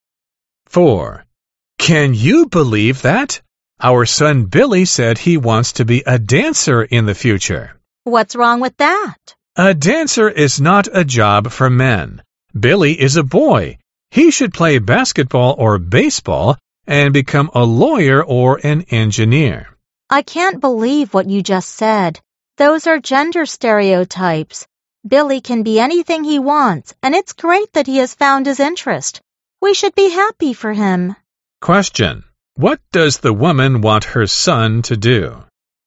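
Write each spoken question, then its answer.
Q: What does the woman want her son to do?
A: Be anything he wants and follow his interest, such as dancing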